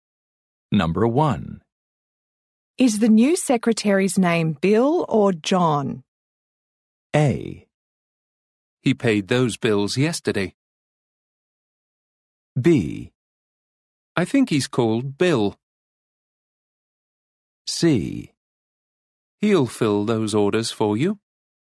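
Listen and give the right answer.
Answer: B: I think he's called Bill.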